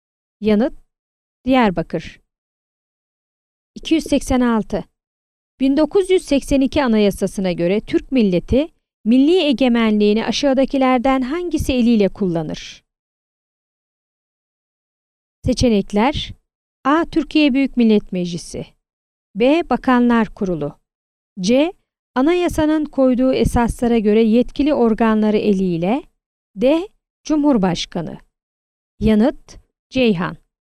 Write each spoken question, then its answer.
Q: 1982 Anayasası'na göre Türk milleti milli egemenliğini aşağıdakilerden hangisi eliyle kullanır?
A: Yanıt: Ceyhan.